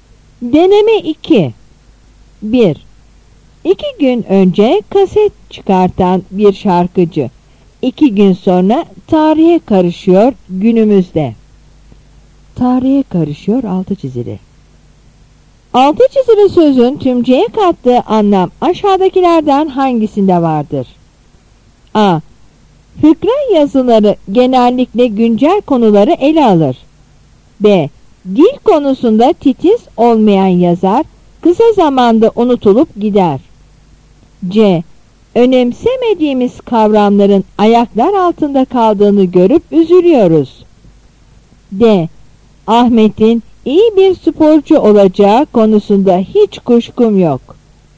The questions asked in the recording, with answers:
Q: Altı çizili sözün tümceye kattığı anlam aşağıdakilerden hangisinde vardır?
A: Yanıt B.